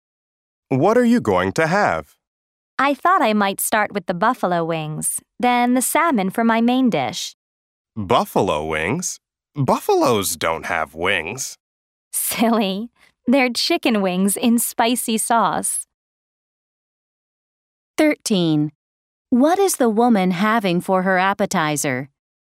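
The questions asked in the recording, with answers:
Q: What is the woman having for her appetizer?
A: Buffalo wings (chicken wings in spicy sauce)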